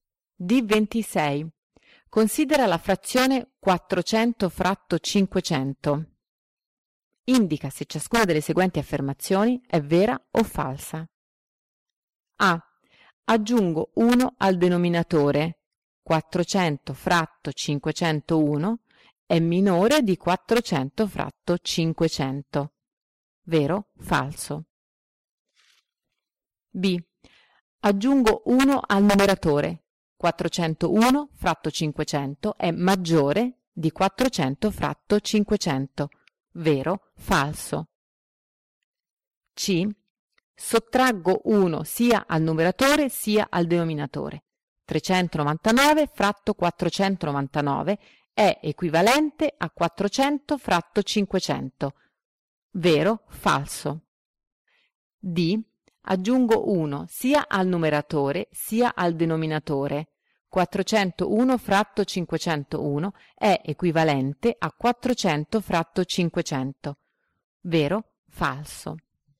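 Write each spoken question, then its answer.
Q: 400 fratto 501 è minore di 400 fratto 500.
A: Vero

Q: 401 fratto 500 è maggiore di 400 fratto 500.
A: Vero

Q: 399 fratto 499 è equivalente a 400 fratto 500.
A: Falso

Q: 401 fratto 501 è equivalente a 400 fratto 500.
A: Falso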